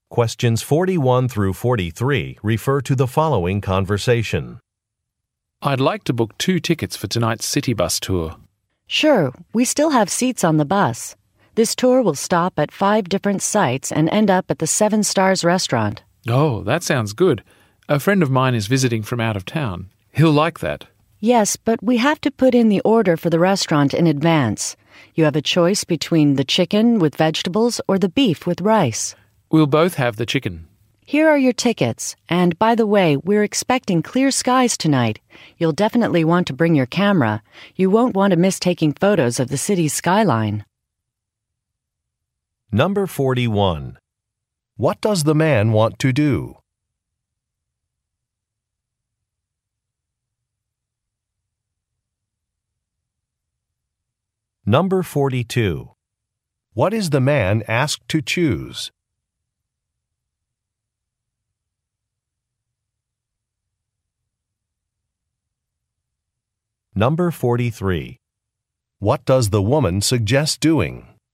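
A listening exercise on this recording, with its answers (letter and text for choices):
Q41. What does the man want to do?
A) Purchase an area map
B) See an event schedule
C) Cancel a hotel reservation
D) Book a bus tour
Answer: D) Book a bus tour

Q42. What is the man asked to choose?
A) When to arrive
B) What to visit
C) How to pay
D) What to eat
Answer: D) What to eat

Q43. What does the woman suggest doing?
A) Wearing a jacket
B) Using a credit card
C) Bringing a camera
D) Looking for a coupon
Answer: C) Bringing a camera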